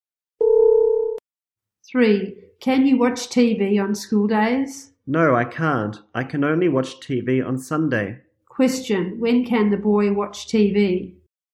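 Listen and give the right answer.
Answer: On Sunday.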